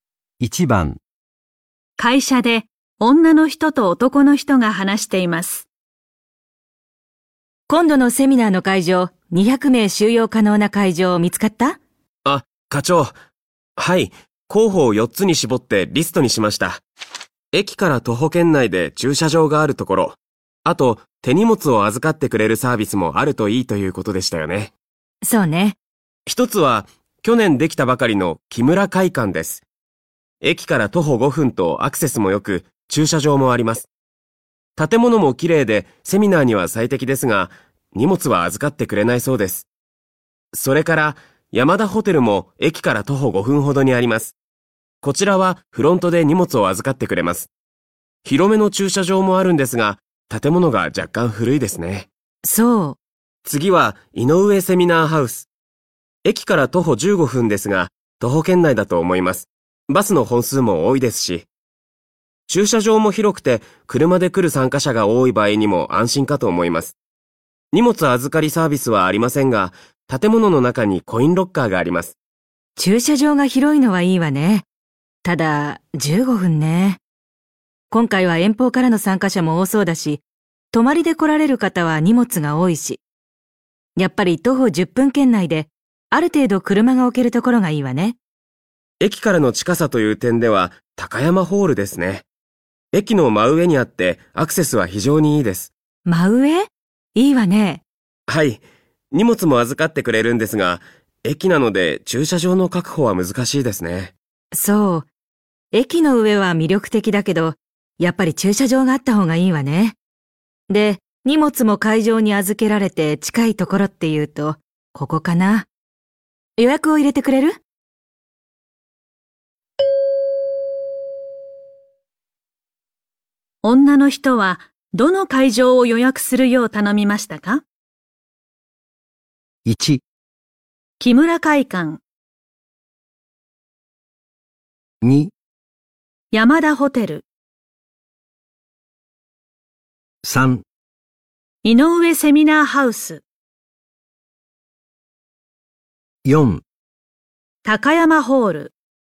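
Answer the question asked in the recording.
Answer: 2: 山田ホテル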